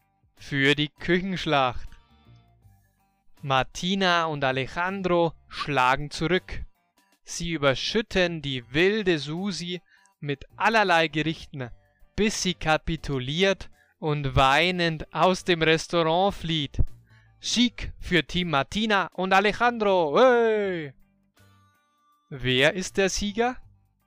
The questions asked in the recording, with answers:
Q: Hey! Wer ist der Sieger?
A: Das Team Martina und Alejandro.